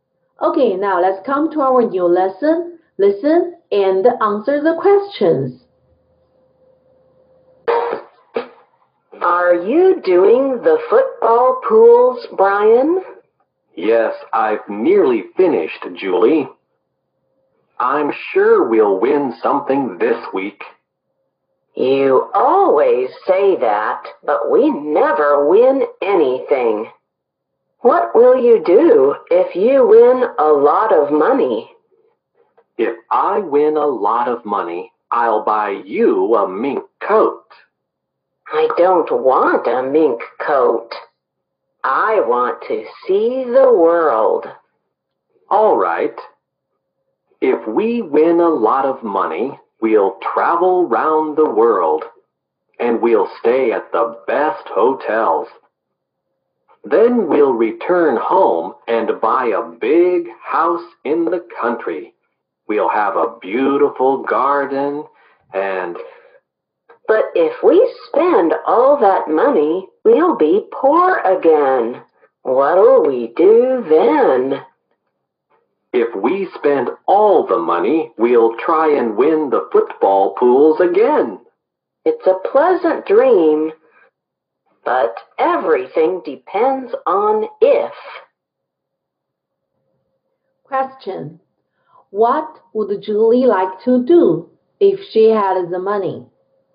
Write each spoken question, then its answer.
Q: What would Julie like to do if she had the money?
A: She would like to travel the world.